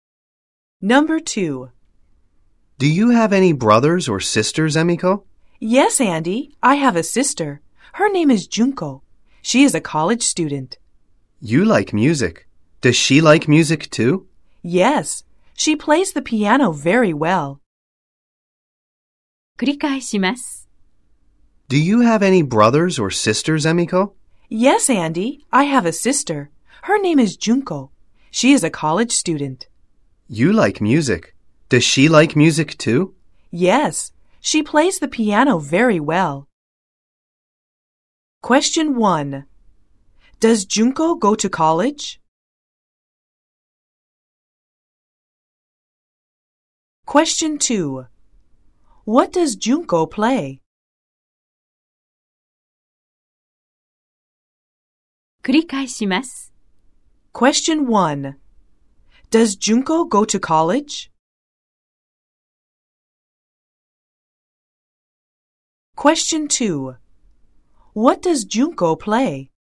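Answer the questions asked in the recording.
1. Yes, she does.
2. She plays the piano.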